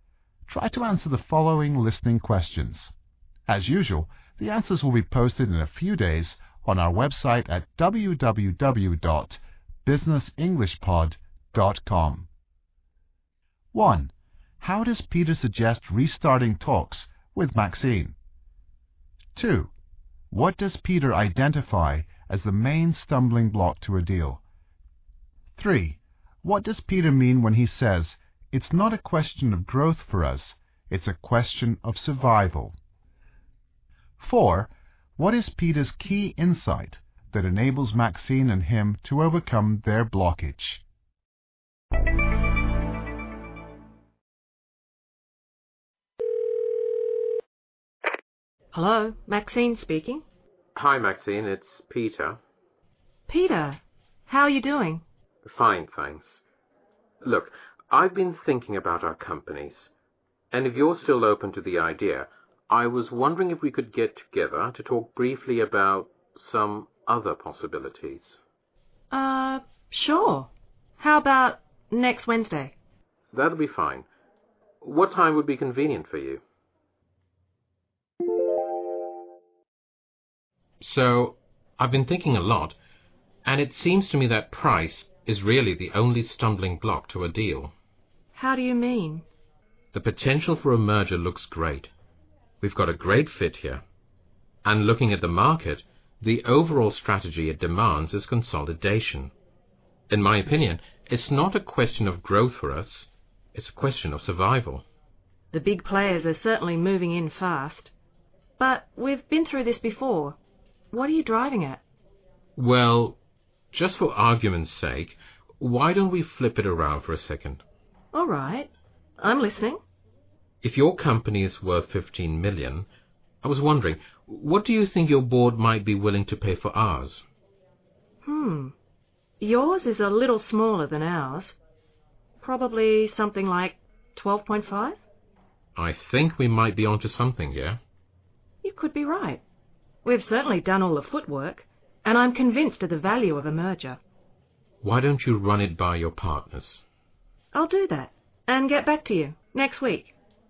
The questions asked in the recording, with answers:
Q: How does Peter suggest restarting talks with Maxine?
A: After making a little small talk, Peter suggests restarting talks.

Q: What does Peter identify as the main stumbling block to a deal?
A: First, Peter identifies the main stumbling block or obstacle to an agreement.

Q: What does Peter mean when he says, "It's not a question of growth for us, it's a question of survival"?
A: In other words, the issue is not merely how to grow quickly, but how to keep the businesses alive.

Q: What is Peter's key insight that enables Maxine and him to overcome their blockage?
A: He quite literally wants to flip around the role of buyer and seller.